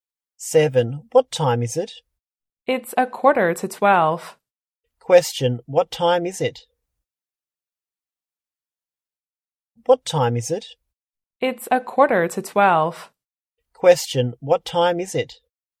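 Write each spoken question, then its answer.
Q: What time is it?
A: 11:45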